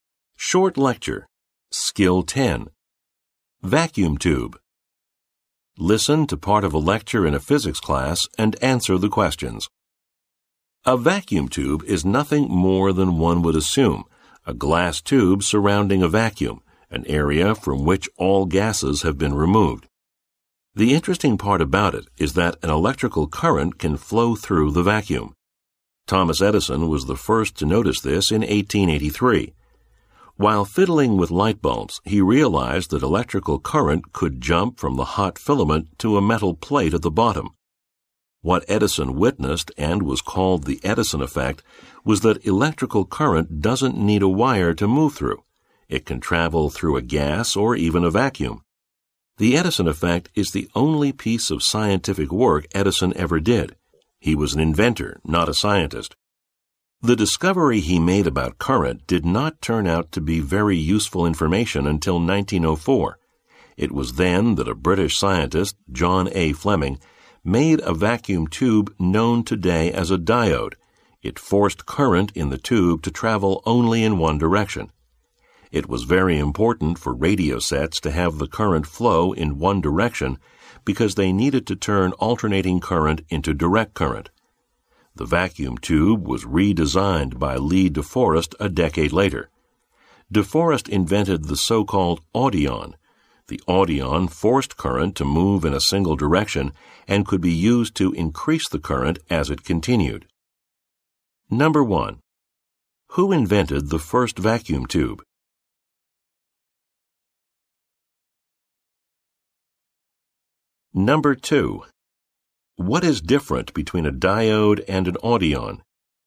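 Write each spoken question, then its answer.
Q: What is different between a diode and an audion?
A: The audion could also increase the current, not just force it to flow in one direction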